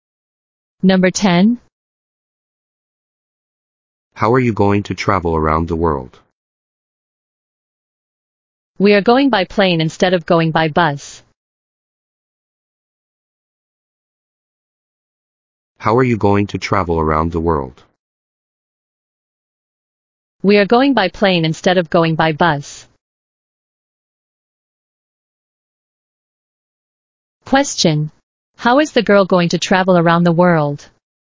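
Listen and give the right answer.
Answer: By plane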